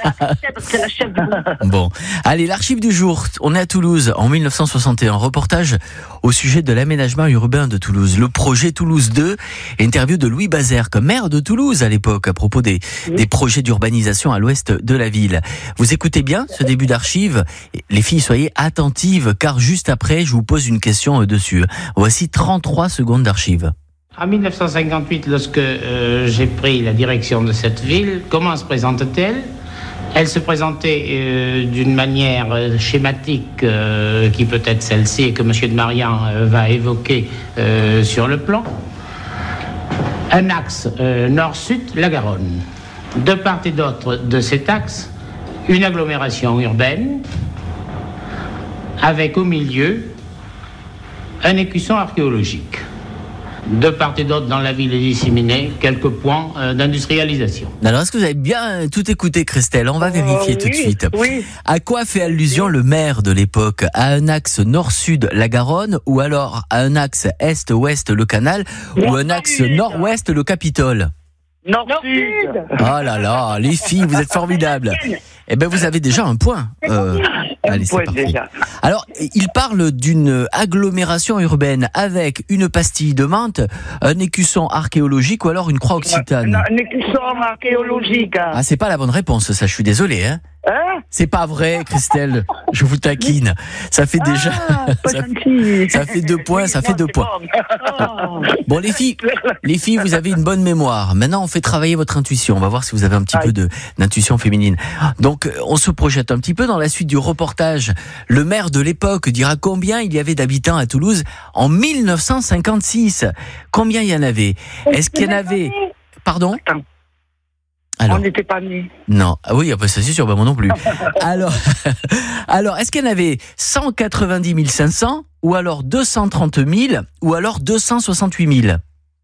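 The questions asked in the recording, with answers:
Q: À quoi fait allusion le maire de l'époque?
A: À un axe nord-sud, la Garonne

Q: Alors, il parle d'une agglomération urbaine avec une pastille de menthe, un écusson archéologique ou alors une croix occitane.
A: Un écusson archéologique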